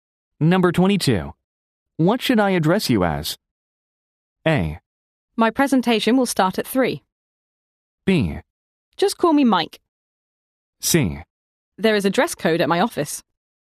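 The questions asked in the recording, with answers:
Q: What should I address you as?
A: B: Just call me Mike.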